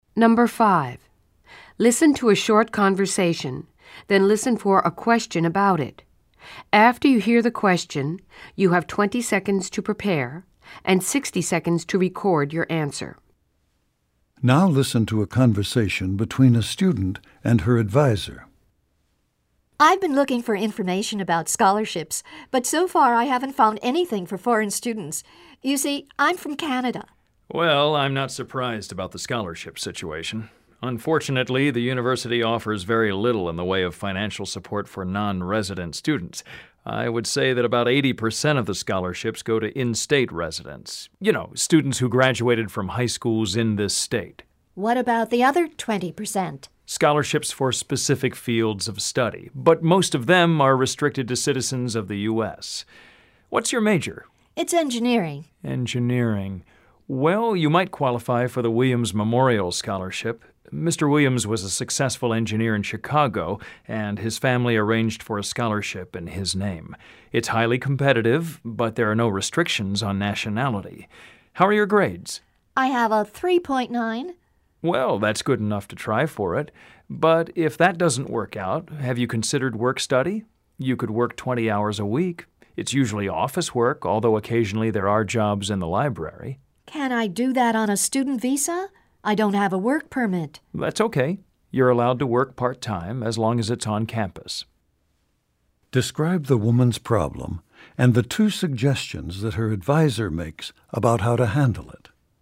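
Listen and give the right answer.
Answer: She is a Canadian student who can't find scholarships for foreign students. The advisor suggests applying for the Williams Memorial Scholarship for engineering students, which has no nationality restrictions, or doing on-campus work-study for 20 hours a week.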